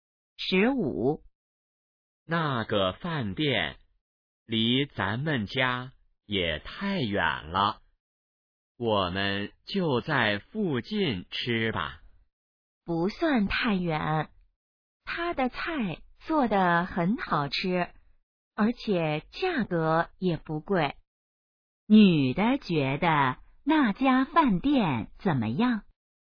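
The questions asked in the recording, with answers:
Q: 女的觉得那家饭店怎么样?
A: 菜好吃,价格不贵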